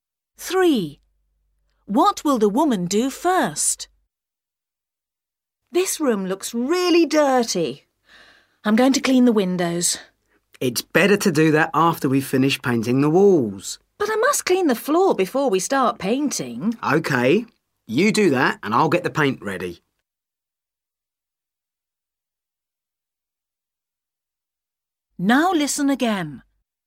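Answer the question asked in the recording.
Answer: clean the floor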